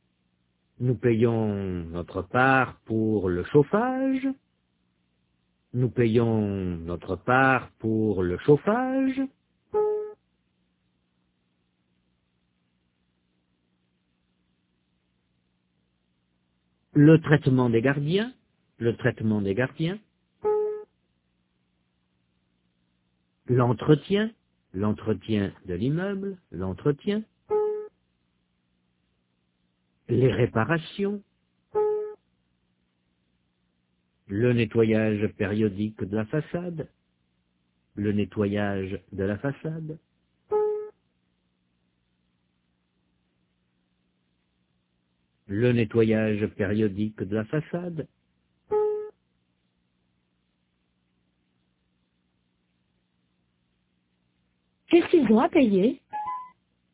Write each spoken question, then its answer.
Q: Qu'est-ce qu'ils ont à payer?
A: Le chauffage, le traitement des gardiens, l'entretien, les réparations, le nettoyage périodique de la façade.